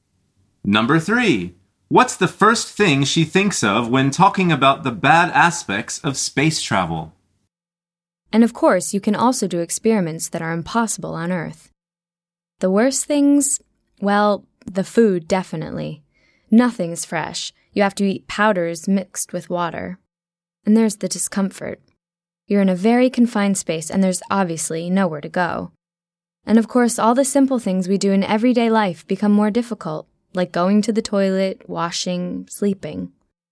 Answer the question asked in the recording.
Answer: The answer is the food.